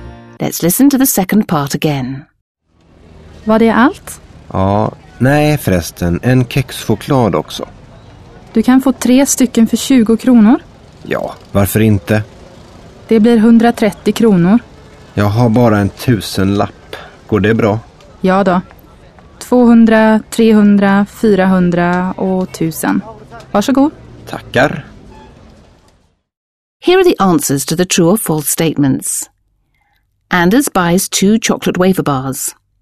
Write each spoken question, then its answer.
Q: Anders buys 2 chocolate wafer bars.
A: False. Anders intends to buy only 1 chocolate wafer, but because of the offer in the kiosk, he buys 3, not 2.